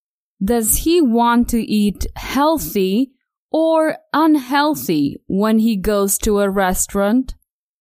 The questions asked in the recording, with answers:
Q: Does he want to eat healthy or unhealthy when he goes to a restaurant?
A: Not unhealthy. Tom wants to eat healthy when he goes to a restaurant.